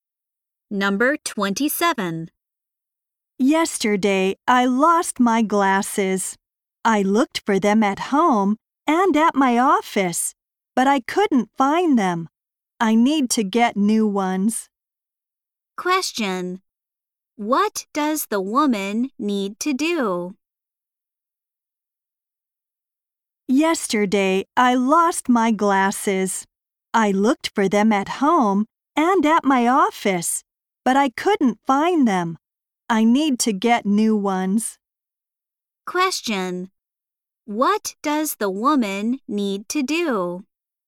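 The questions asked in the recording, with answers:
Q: What does the woman need to do?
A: Get new glasses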